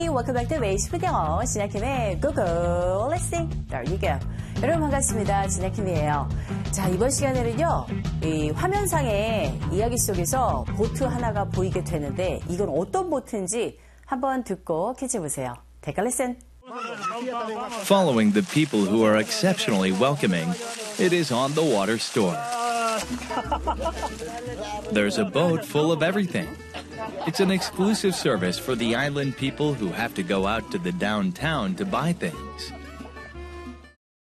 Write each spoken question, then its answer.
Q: 이건 어떤 보트인지 한번 듣고 캐치해 보세요.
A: 바로 이 배는요, 상점, 그 배 위에 매점처럼 되어 있는 그런 배입니다.